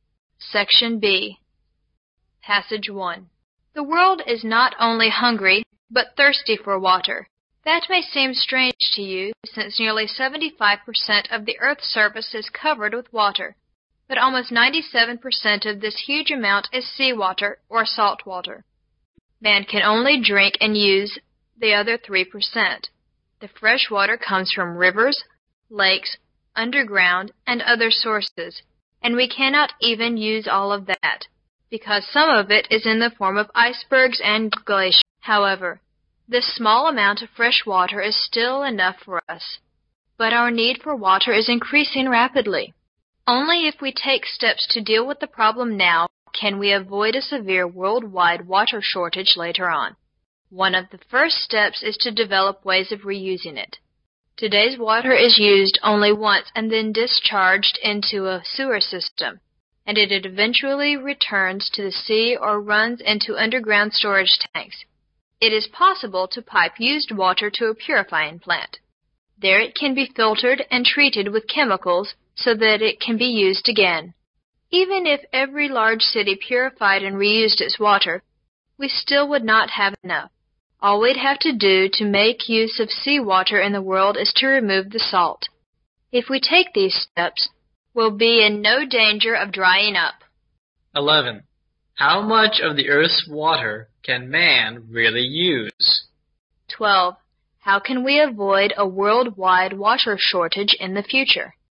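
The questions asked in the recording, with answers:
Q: How much of the Earth's water can man really use?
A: About 3% (the fresh water)

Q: How can we avoid a worldwide water shortage in the future?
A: By taking steps now: reusing purified water and removing salt from seawater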